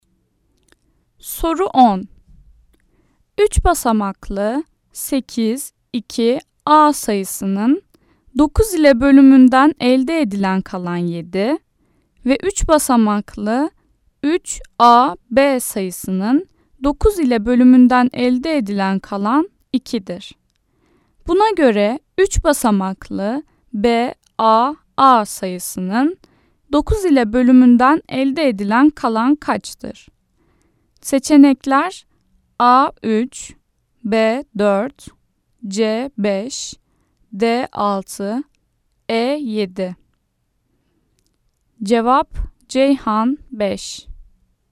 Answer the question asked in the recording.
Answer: Cevap Ceyhan 5.